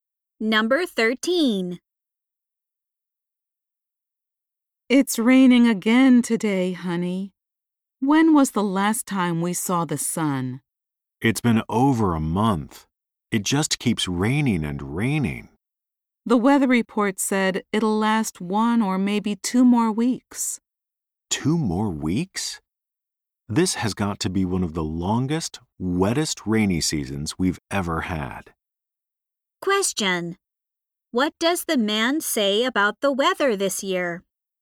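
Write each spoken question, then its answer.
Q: What does the man say about the weather this year?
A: It is one of the longest, wettest rainy seasons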